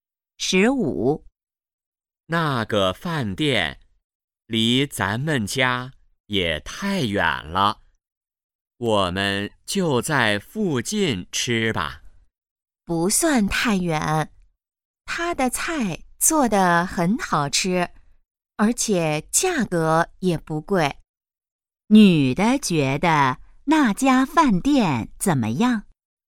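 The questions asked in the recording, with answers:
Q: 女的觉得那家饭店怎么样?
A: 菜好吃,价格不贵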